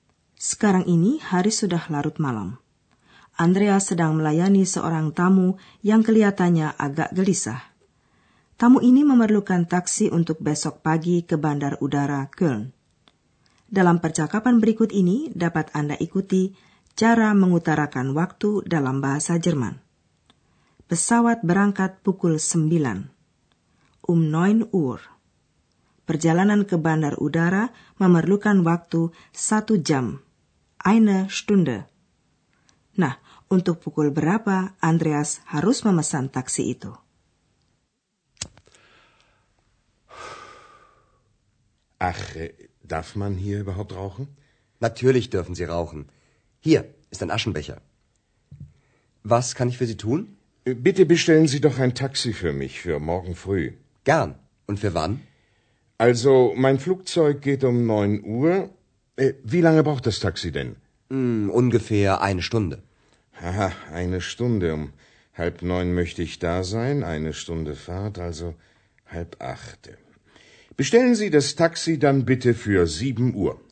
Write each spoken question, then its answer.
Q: Na, untuk pukul berapa Andreas harus memesan taksi itu?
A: Jadi Andreas harus memesan taksi untuk besok pagi pukul tujuh.